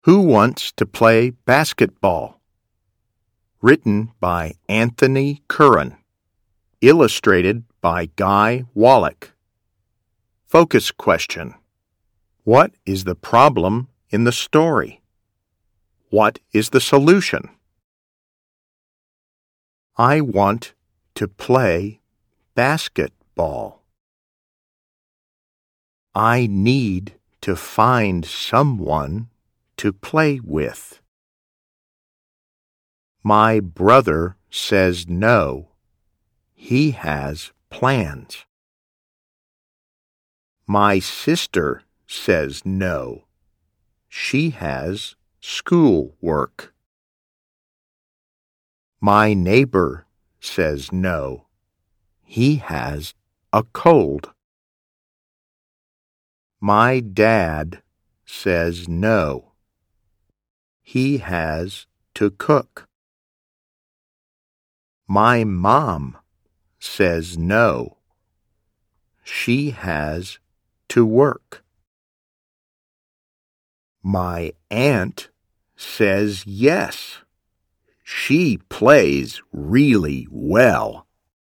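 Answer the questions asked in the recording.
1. The child wants to play basketball but can't find anyone to play with.
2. The aunt says yes and plays with the child.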